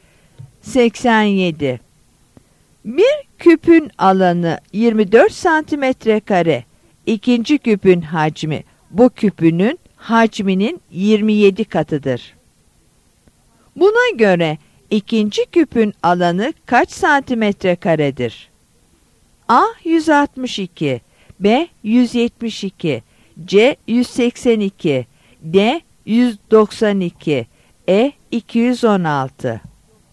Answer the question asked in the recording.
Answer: Yanıt E.